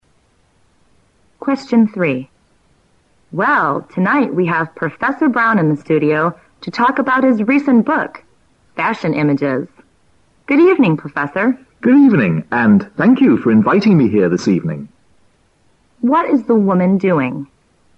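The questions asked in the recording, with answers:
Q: What is the woman doing?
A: Interviewing Professor Brown on a radio/TV program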